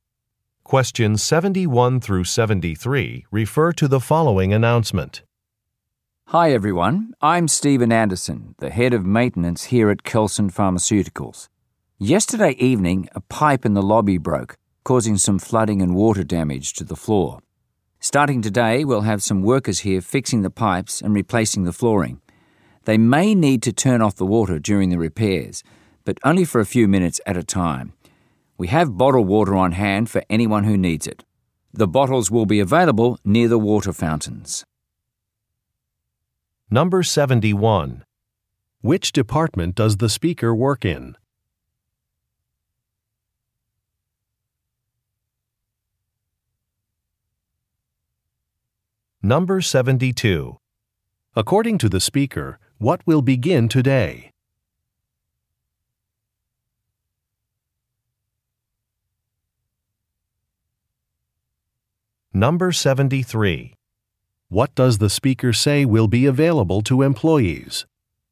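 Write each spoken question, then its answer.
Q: Which department does the speaker work in?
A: Maintenance

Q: According to the speaker, what will begin today?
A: Repairs to the pipes and flooring

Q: What does the speaker say will be available to employees?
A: Bottled water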